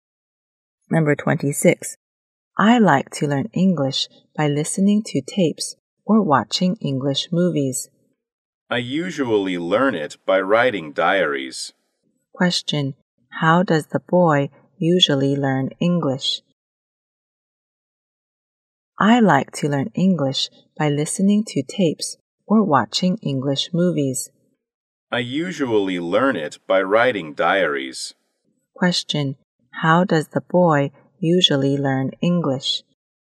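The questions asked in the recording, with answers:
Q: How does the boy usually learn English?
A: By writing diaries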